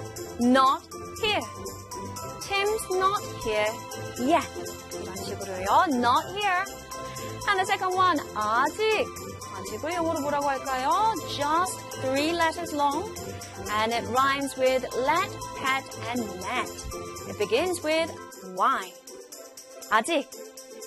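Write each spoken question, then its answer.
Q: 아직을 영어로 뭐라고 할까요?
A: yet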